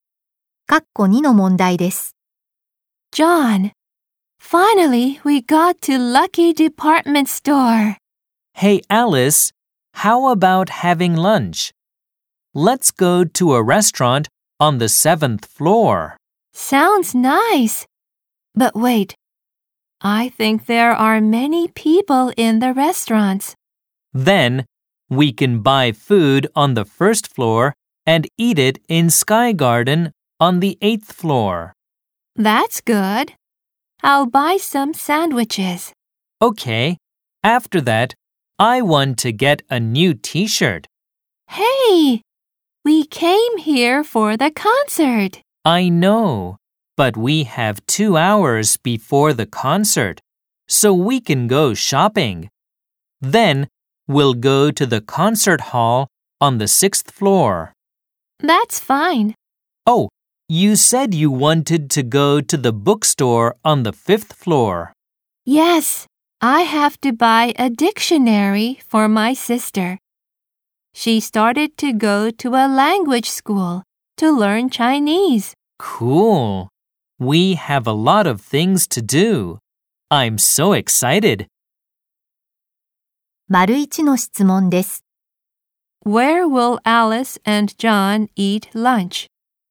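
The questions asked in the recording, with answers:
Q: Where will Alice and John eat lunch?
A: In Sky Garden on the 8th floor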